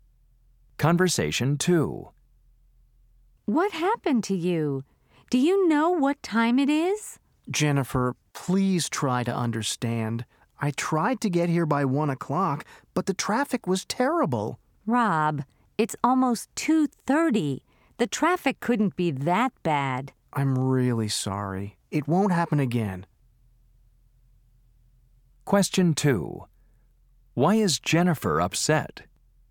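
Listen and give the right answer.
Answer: Rob was late, arriving almost 2:30 instead of 1 o'clock.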